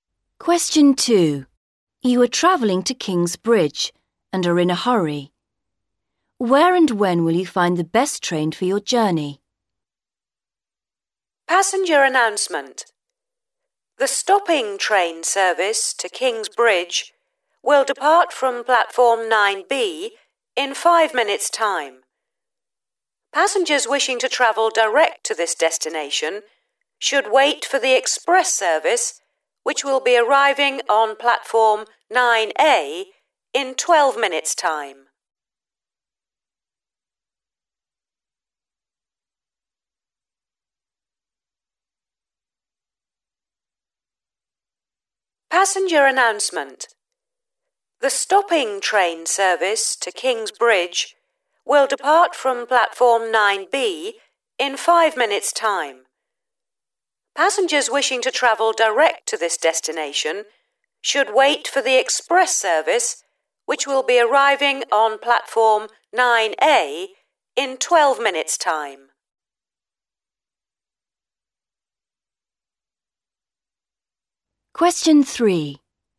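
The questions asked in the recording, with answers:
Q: Where and when will you find the best train for your journey?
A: Platform 9A in 12 minutes' time (express service)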